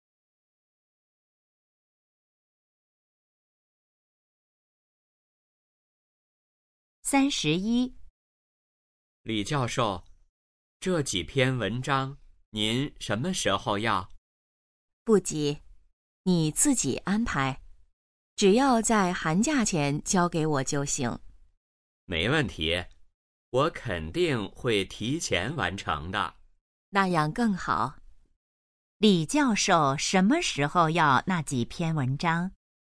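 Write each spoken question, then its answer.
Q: 李教授什么时候要那几篇文章?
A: 寒假前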